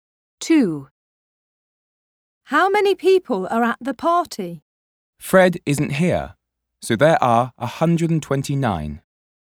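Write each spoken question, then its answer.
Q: How many people are at the party?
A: 129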